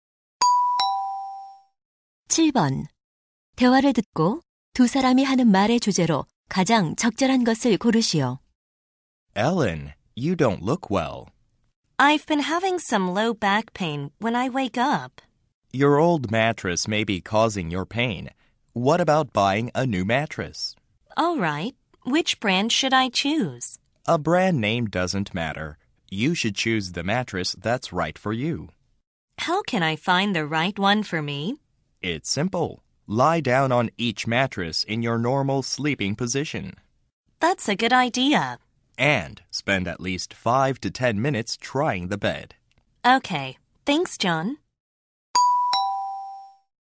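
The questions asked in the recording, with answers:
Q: 대화를 듣고 두 사람이 하는 말의 주제로 가장 적절한 것을 고르시오.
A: 자신에게 맞는 매트리스 고르는 법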